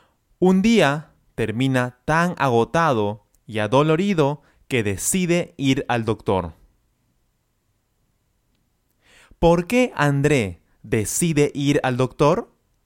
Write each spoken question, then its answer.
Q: ¿Por qué André decide ir al doctor?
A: Él decide ir al doctor porque un día terminó demasiado agotado y adolorido.